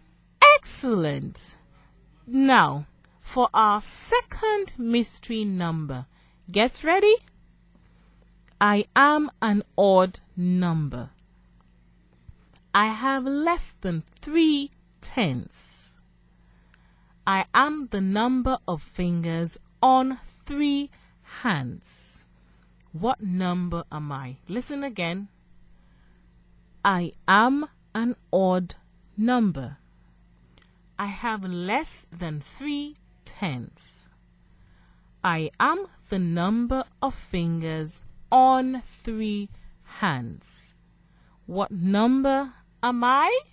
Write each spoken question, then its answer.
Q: What number am I?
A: The mystery number is 15.